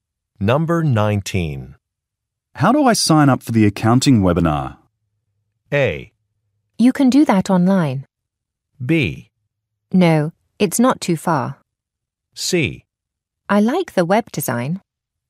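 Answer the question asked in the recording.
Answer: A: You can do that online.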